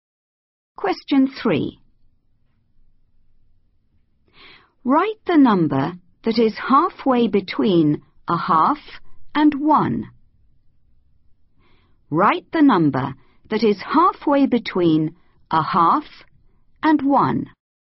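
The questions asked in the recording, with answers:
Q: Write the number that is halfway between a half and 1.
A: 3/4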